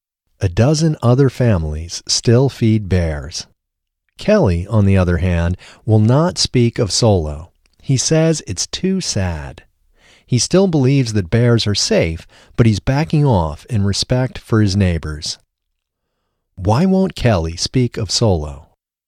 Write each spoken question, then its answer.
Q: Why won't Kelly speak of Solo?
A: Kelly won't speak of Solo because it's too sad.